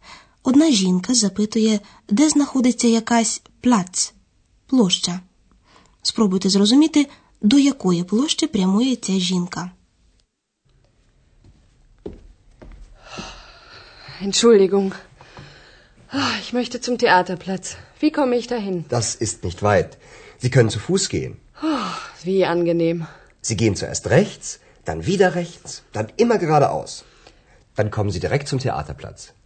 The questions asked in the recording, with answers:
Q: Спробуйте зрозуміти, до якої площі прямує ця жінка.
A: Площа, яку шукає жінка, називається театральною.